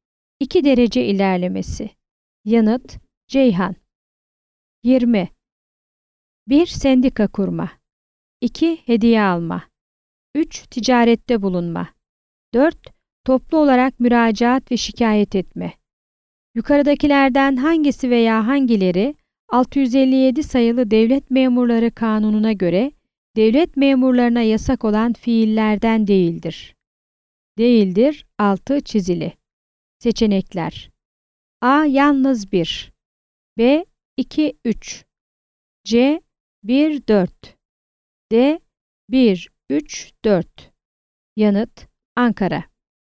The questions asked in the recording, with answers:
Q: Yukarıdakilerden hangisi veya hangileri 657 sayılı Devlet Memurları Kanunu'na göre devlet memurlarına yasak olan fiillerden değildir?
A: Yanıt. Ankara.